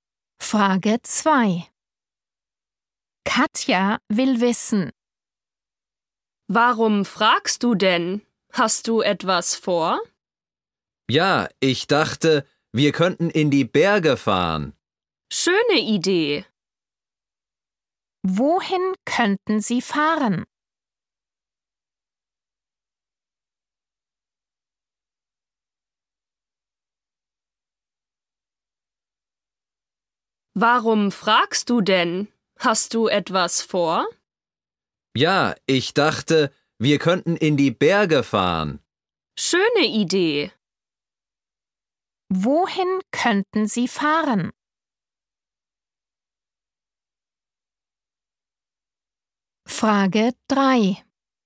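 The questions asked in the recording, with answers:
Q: Wohin könnten Sie fahren?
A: In die Berge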